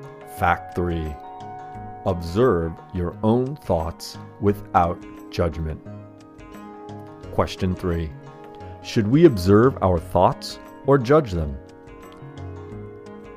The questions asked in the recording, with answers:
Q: Should we observe our thoughts or judge them?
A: We should observe our own thoughts without judgment.